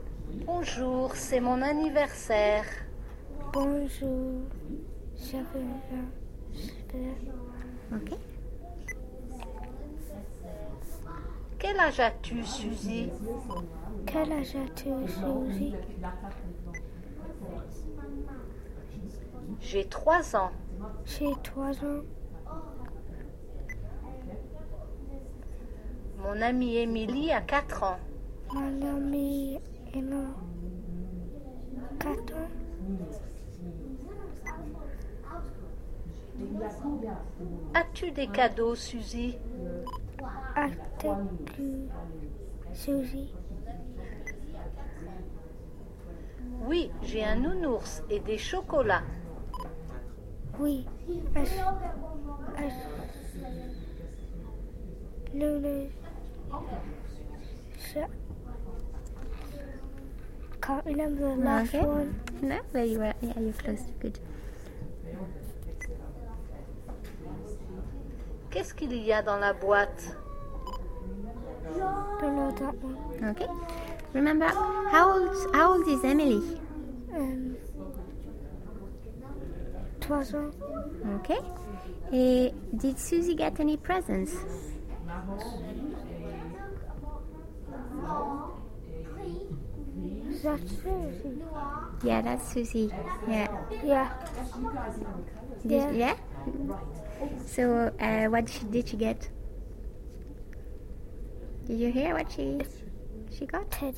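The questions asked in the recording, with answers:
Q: And did Susie get any presents?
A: Yes

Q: So, what did she get? Did you hear what she got?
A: A teddy bear and chocolates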